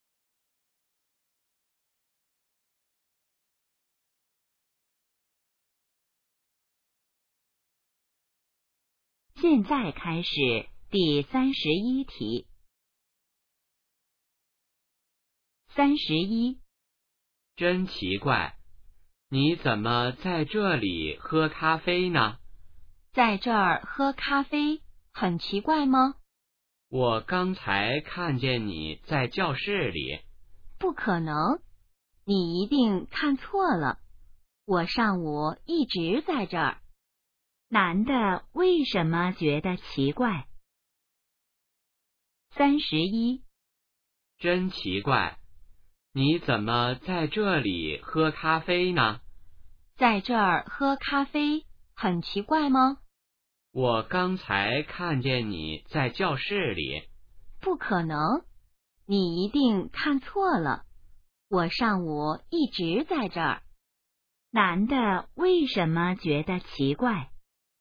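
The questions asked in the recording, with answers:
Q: 男的为什么觉得奇怪?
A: 他刚才好像看见女的在教室里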